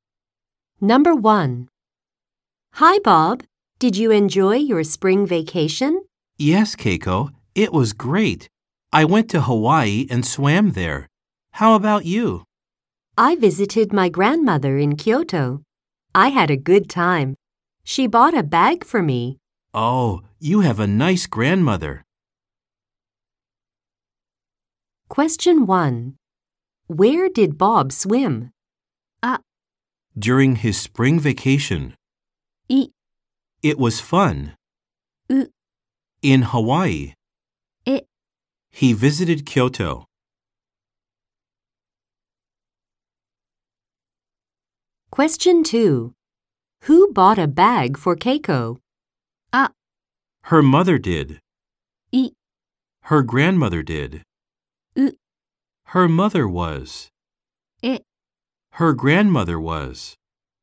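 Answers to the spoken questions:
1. C: In Hawaii.
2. B: Her grandmother did.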